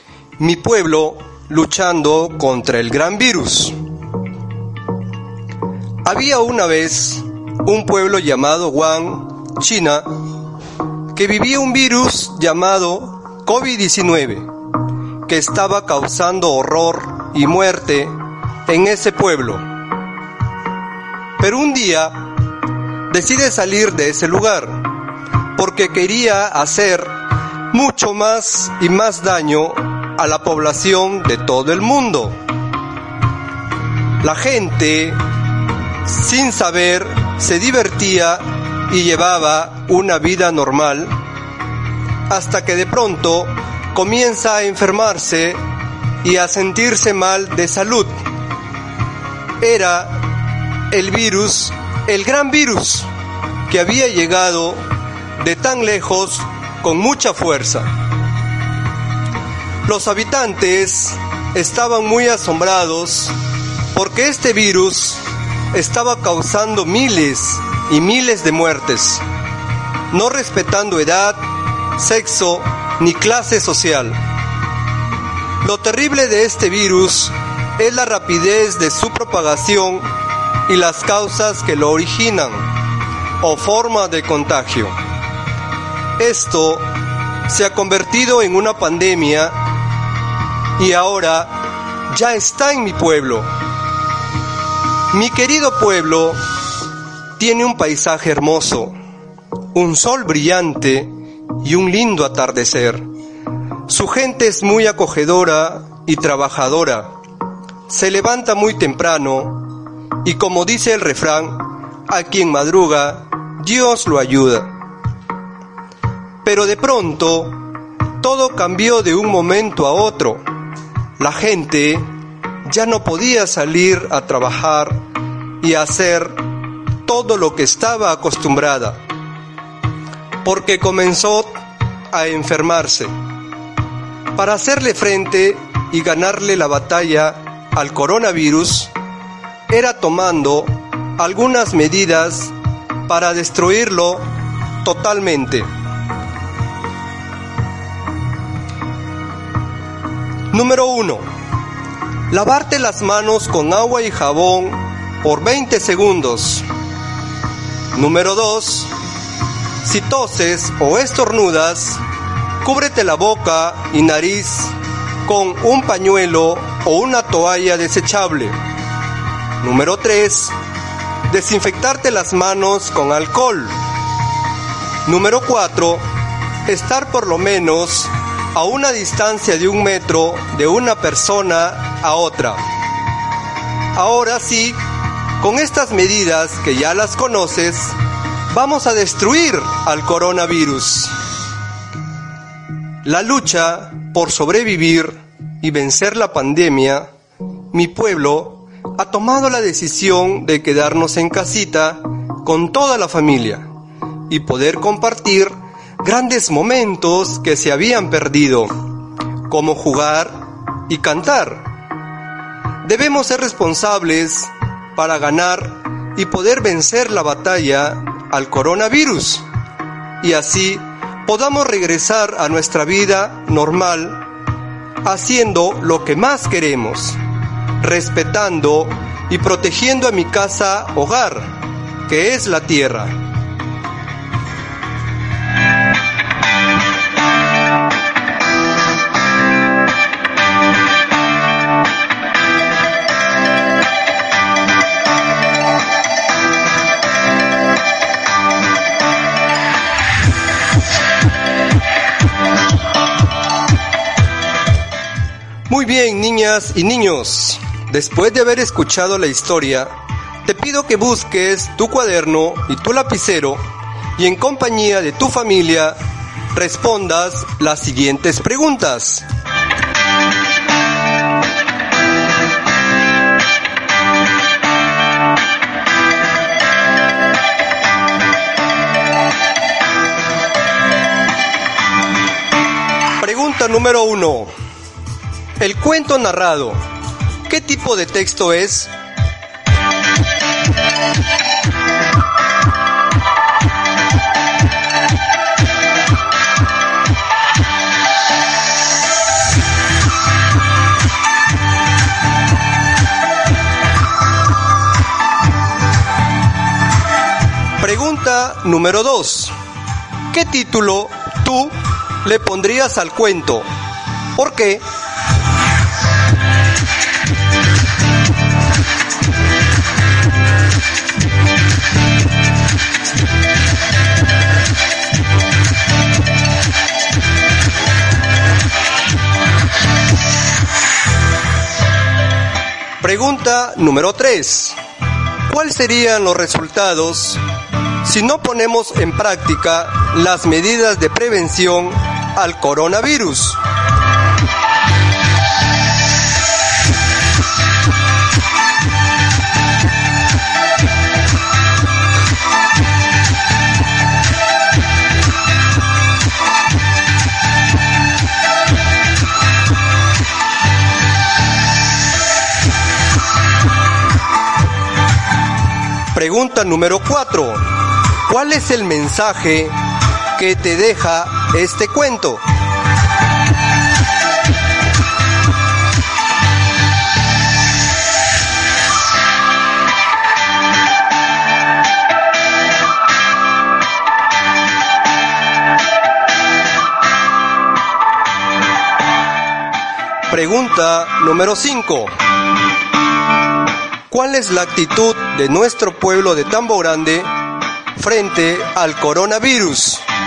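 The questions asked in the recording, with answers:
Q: ¿Qué tipo de texto es?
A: Un cuento (texto narrativo)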